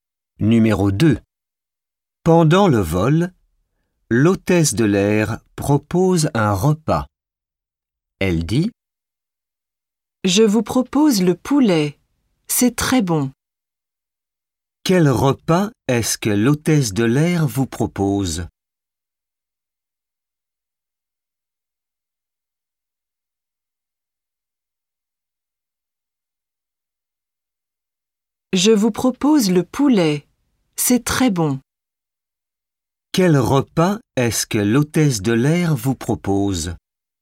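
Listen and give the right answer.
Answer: Le poulet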